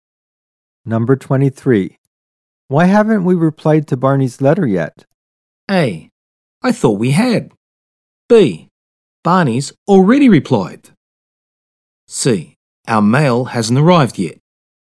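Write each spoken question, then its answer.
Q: Why haven't we replied to Barney's letter yet?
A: A: I thought we had.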